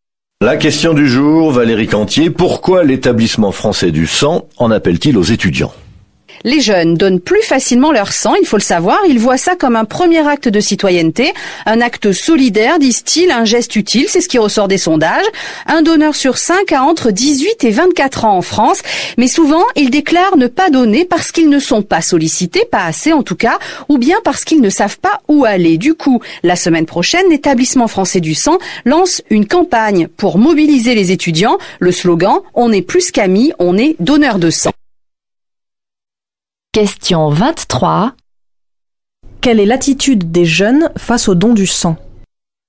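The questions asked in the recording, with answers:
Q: Quelle est l'attitude des jeunes face au don du sang ?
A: Ils donnent plus facilement leur sang, le voyant comme un acte citoyen et solidaire.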